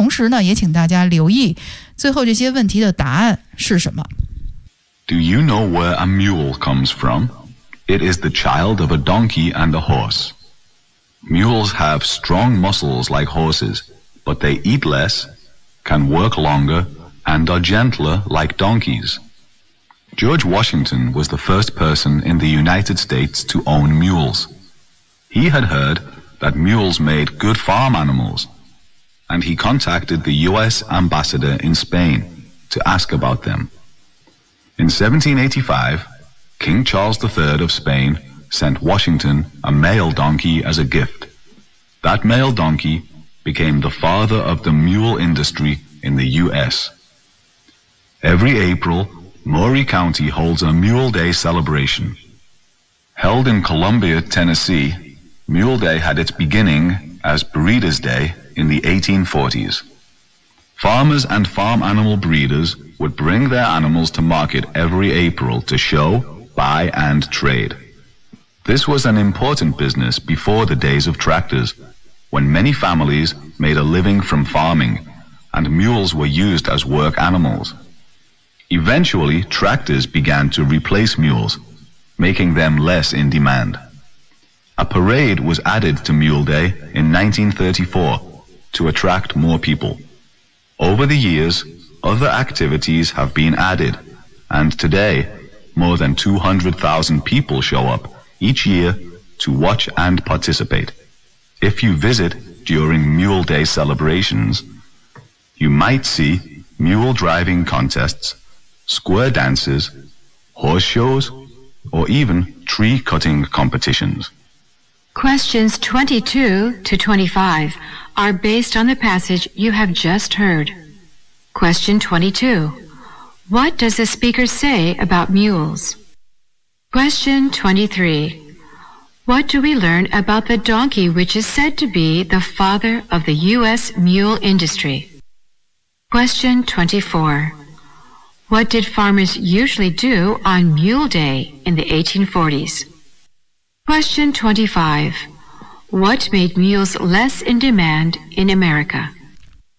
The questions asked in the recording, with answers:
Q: What does the speaker say about mules?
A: So it is the child of a donkey and a horse.

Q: What do we learn about the donkey which is said to be the father of the U.S. mule industry?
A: In 1785, the King Charles III of Spain sent a donkey as a gift.

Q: What did farmers usually do on Mule Day in the 1840s?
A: Animals were brought to market in April to show and to buy and trade

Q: What made mules less in demand in America?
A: the popularity of tractors finally replace the mules